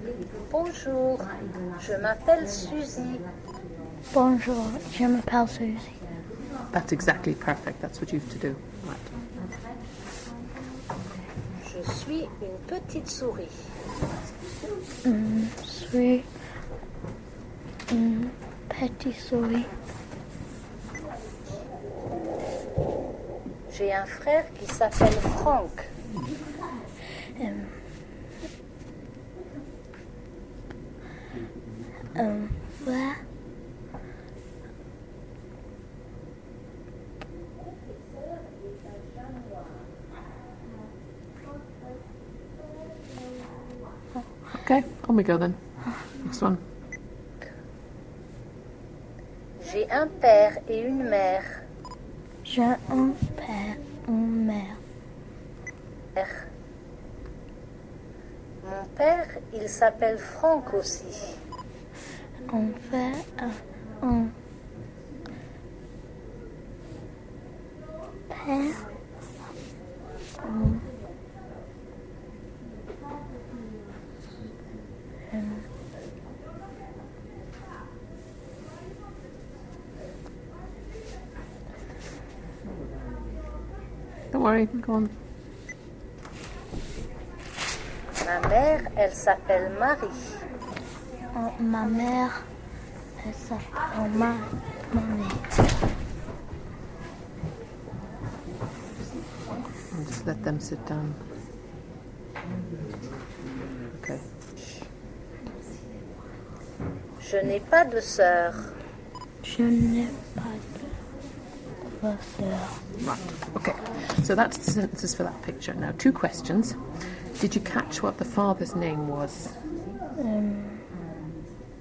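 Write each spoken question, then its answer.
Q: Did you catch what the father's name was?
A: Franck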